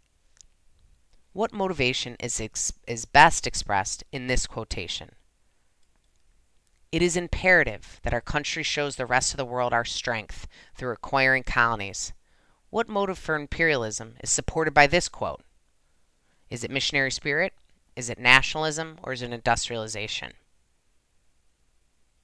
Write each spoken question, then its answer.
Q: What motive for imperialism is supported by this quote?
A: If you said nationalism, you are correct.